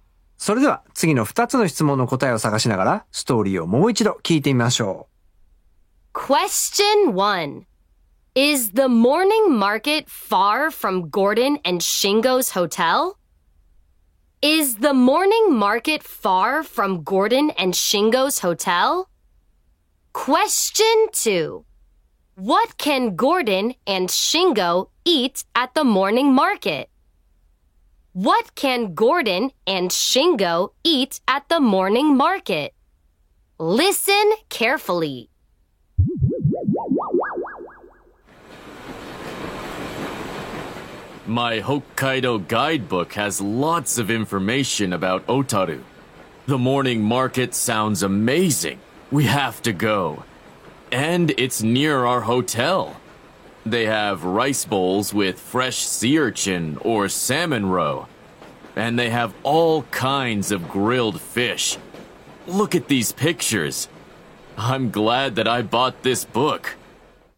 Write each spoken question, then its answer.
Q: Is the morning market far from Gordon and Shingo's hotel?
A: No, it isn't.

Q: What can Gordon and Shingo eat at the morning market?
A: They can eat rice bowls with fresh sea urchin or salmon roe and all kinds of grilled fish.